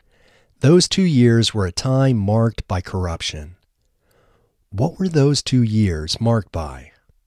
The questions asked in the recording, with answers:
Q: What were those 2 years marked by?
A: Those 2 years were marked by corruption.